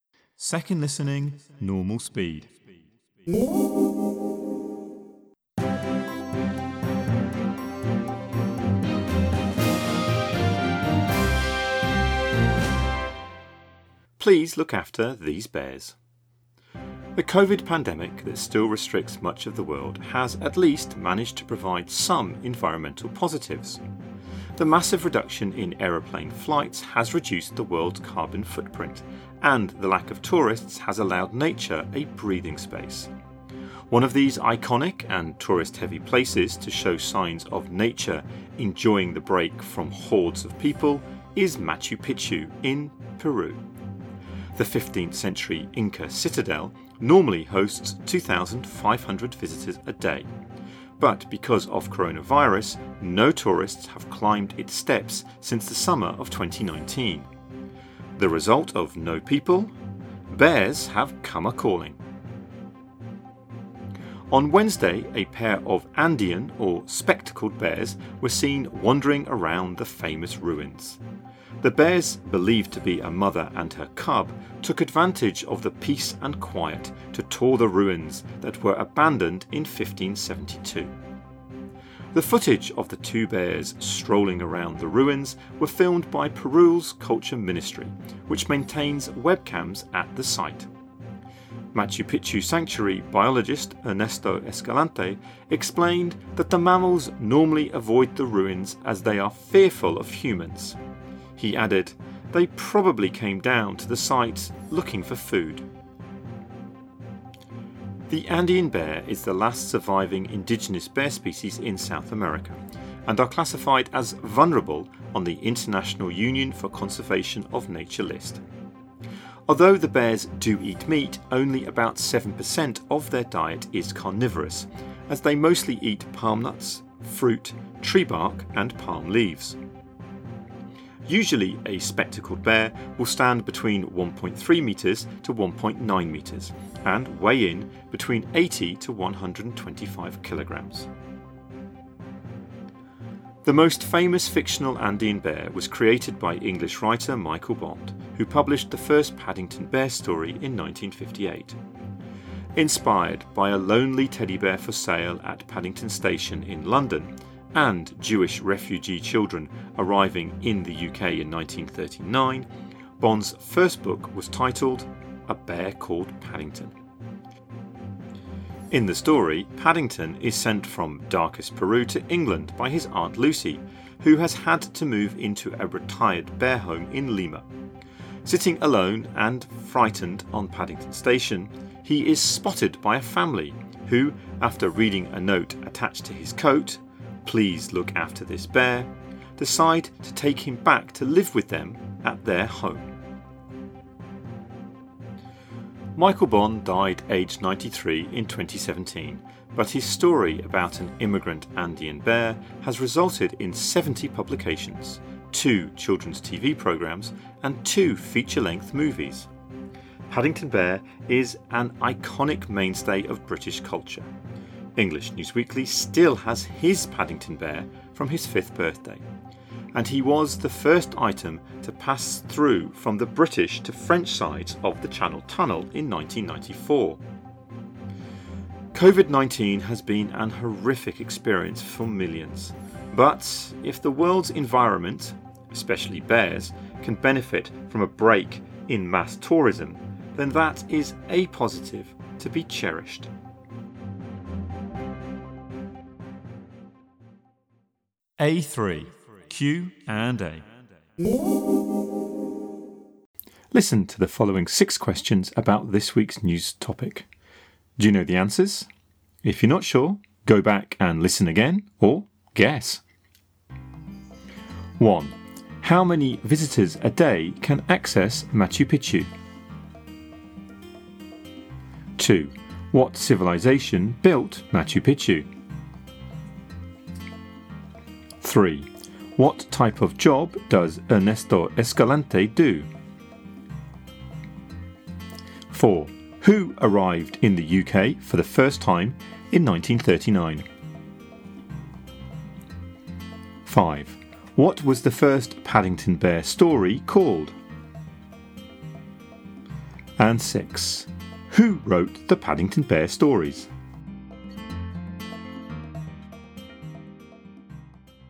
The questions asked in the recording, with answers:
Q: How many visitors a day can access Machu Picchu?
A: 2500.

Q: What civilization built Machu Picchu?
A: Incas.

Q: What type of job does Ernesto Escalante do?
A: Biologist.

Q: Who arrived in the UK for the first time in 1939?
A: Jewish refugee children.

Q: What was the first Paddington Bear story called?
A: A bear called Paddington.

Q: Who wrote the Paddington Bear stories?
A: Michael Bond.